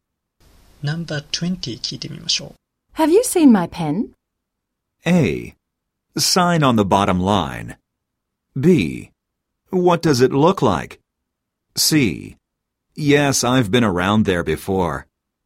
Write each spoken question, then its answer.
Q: Have you seen my pen?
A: このことから、正しい応答は B です。